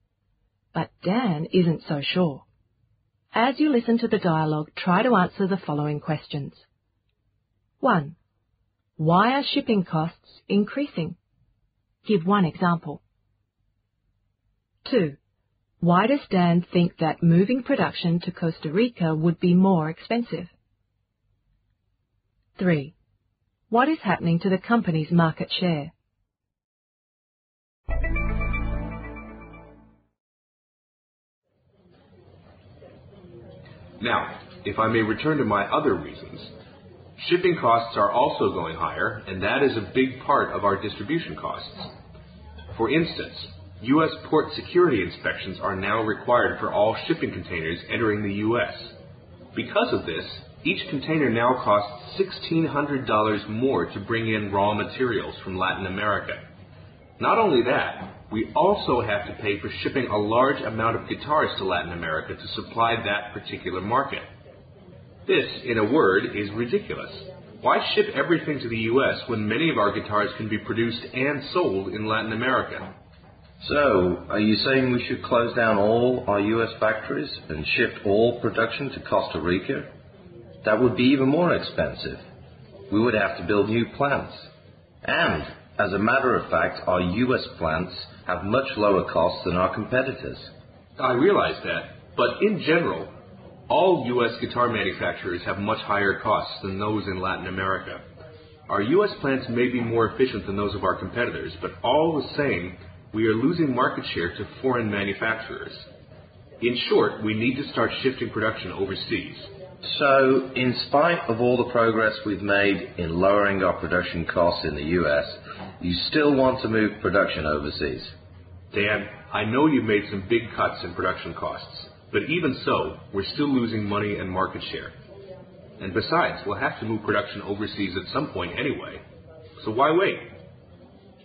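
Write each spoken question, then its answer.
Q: Why are shipping costs increasing? Give one example.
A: U.S. port security inspections are now required for all shipping containers, adding $1,600 per container

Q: Why does Dan think that moving production to Costa Rica would be more expensive?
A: They would have to build new plants

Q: What is happening to the company's market share?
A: It is decreasing; they are losing market share to foreign manufacturers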